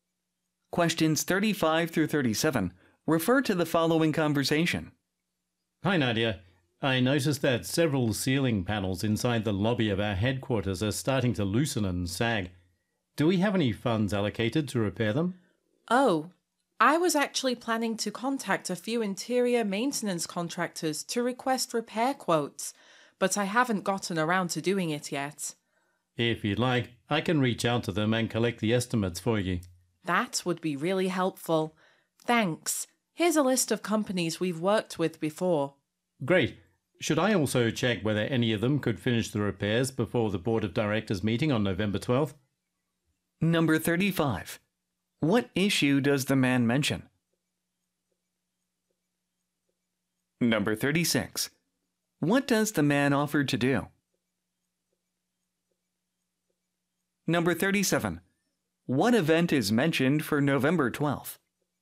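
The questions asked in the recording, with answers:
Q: What issue does the man mention?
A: Ceiling panels in the lobby are loosening and sagging

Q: What event is mentioned for November 12th?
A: A Board of Directors meeting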